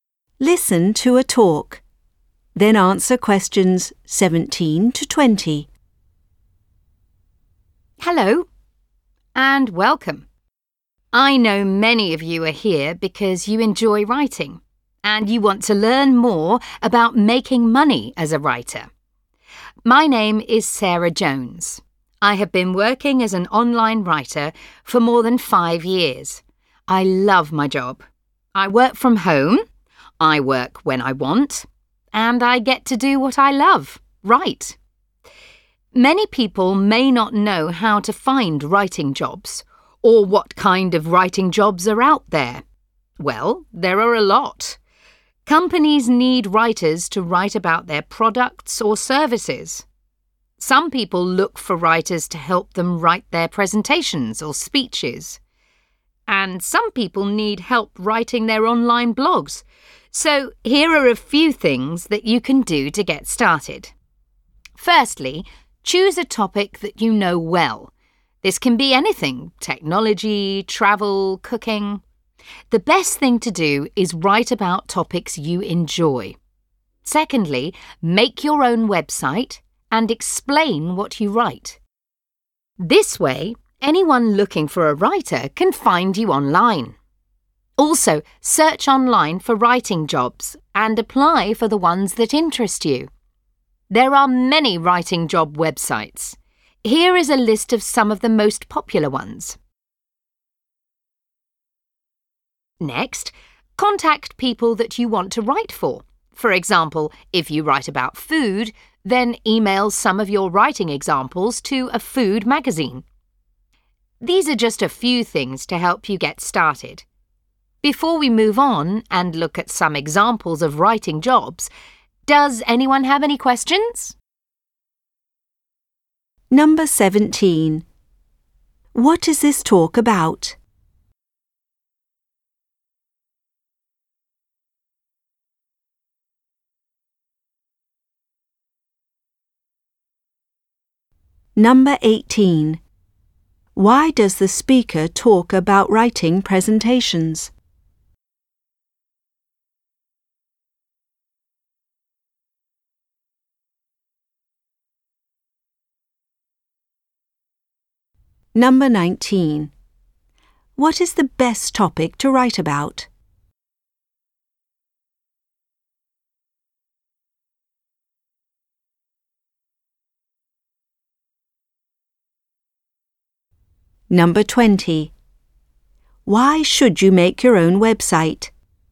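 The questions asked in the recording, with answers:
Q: What is this talk about?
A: How to get started making money as a writer

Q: Why does the speaker talk about writing presentations?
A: As an example of the kinds of writing jobs out there

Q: What is the best topic to write about?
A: Topics you enjoy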